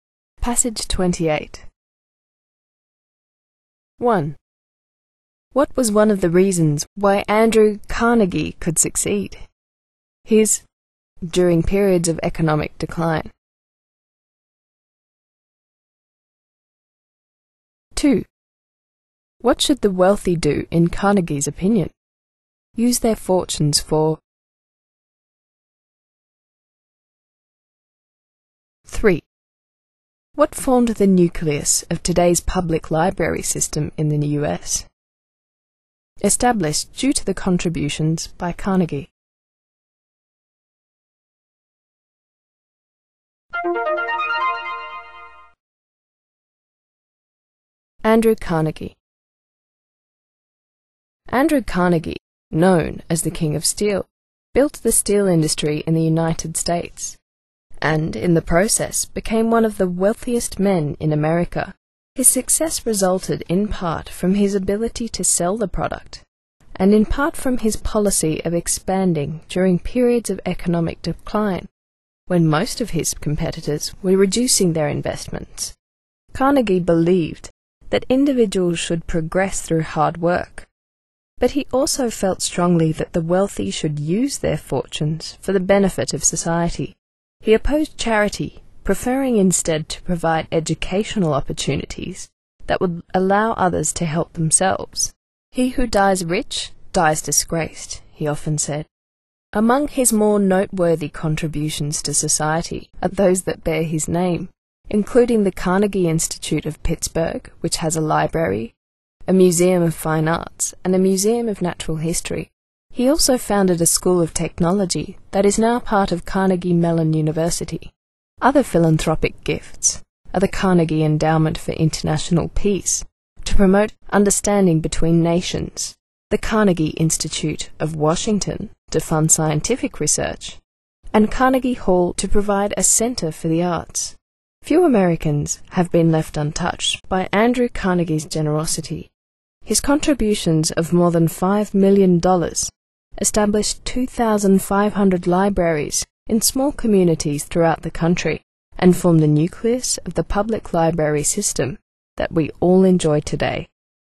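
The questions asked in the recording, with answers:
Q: What was one of the reasons why Andrew Carnegie could succeed?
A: His policy of expanding during periods of economic decline

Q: What should the wealthy do in Carnegie's opinion?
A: Use their fortunes for the benefit of society

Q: What formed the nucleus of today's public library system in the US?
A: The 2,500 libraries in small communities established due to the contributions by Carnegie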